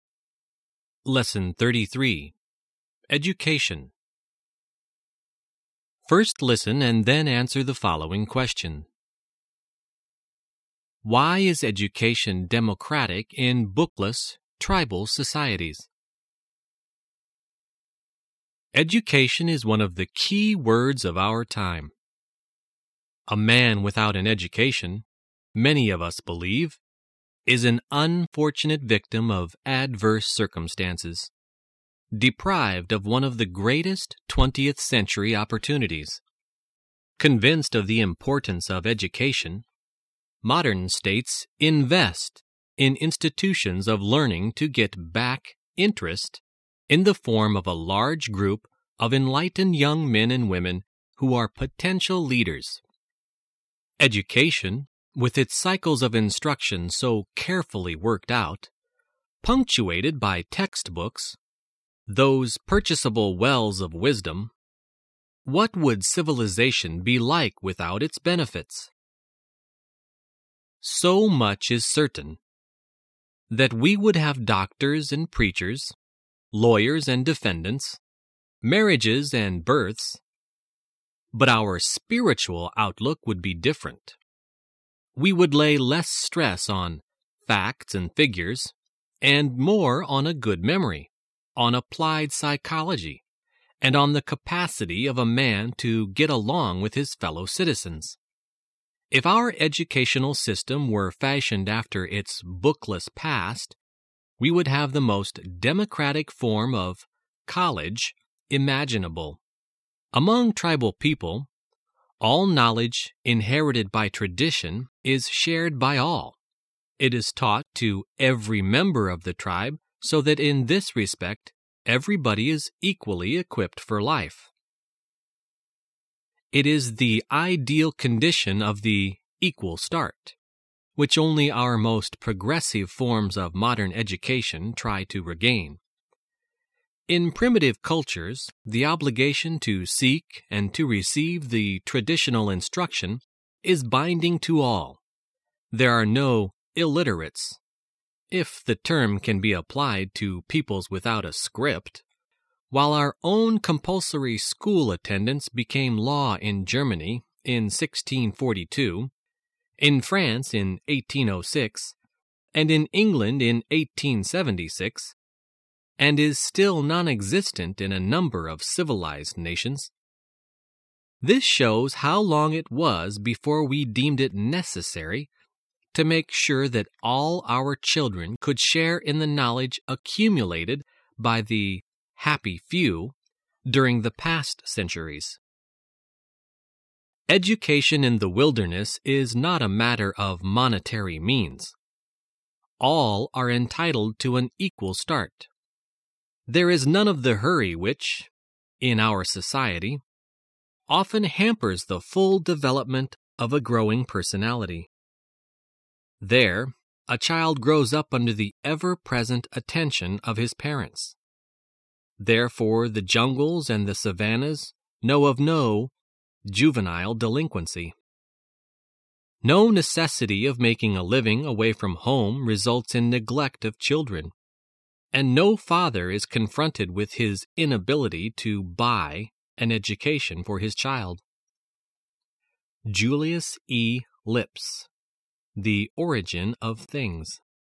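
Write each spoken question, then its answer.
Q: Why is education democratic in bookless, tribal societies?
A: Because all traditional knowledge is shared by all and taught to every member of the tribe, so everyone has an equal start regardless of money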